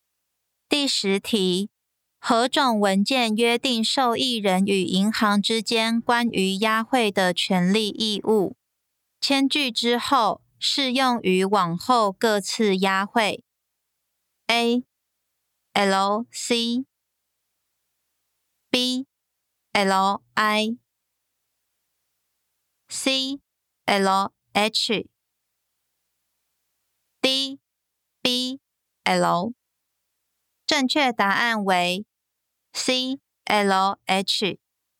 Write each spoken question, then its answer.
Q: 何种文件约定受益人与银行之间关于押汇的权利义务?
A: 正确答案为 C. L. H.